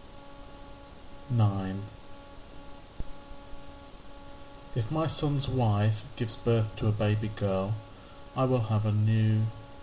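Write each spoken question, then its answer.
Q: If my son's wife gives birth to a baby girl, I will have a new...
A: granddaughter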